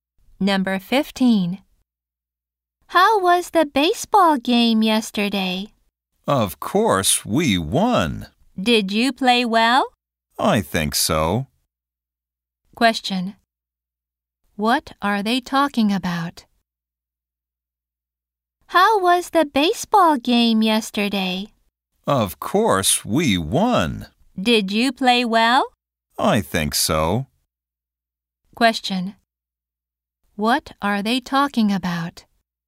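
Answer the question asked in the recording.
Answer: A baseball game.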